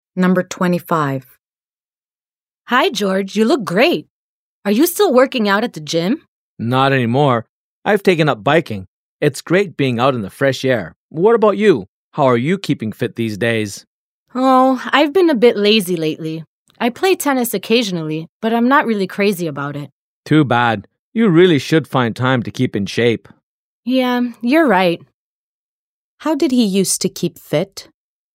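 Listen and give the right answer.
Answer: By working out at the gym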